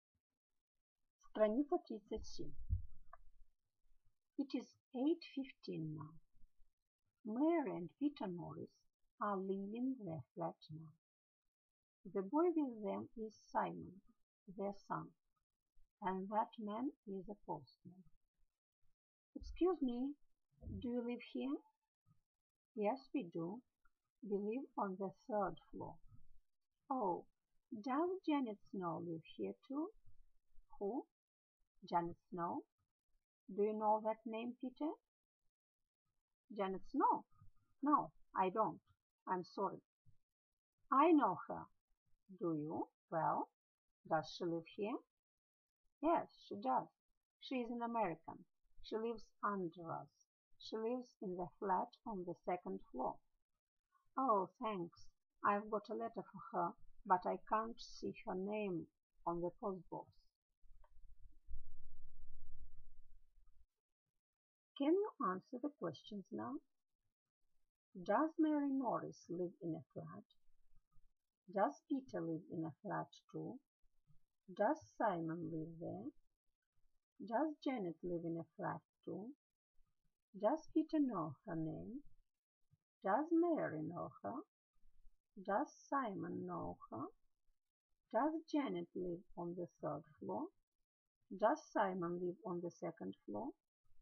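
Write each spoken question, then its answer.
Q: Does Mary Norris live in a flat?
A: Yes, she does.

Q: Does Peter live in a flat too?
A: Yes, he does.

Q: Does Simon live there?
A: Yes, he does.

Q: Does Janet live in a flat too?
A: Yes, she does.

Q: Does Peter know her name?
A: No, he doesn't.

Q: Does Simon know her?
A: Yes, he does.

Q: Does Janet live on the third floor?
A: No, she doesn't. She lives on the second floor.

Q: Does Simon live on the second floor?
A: No, he doesn't. He lives on the third floor.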